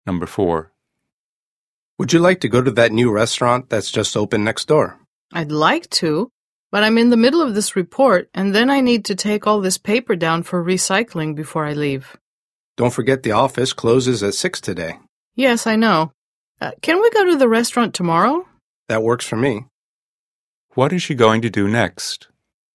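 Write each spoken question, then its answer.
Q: What is she going to do next?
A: Finish her report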